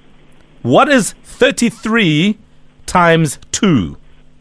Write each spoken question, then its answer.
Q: What is 33 times 2?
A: 66.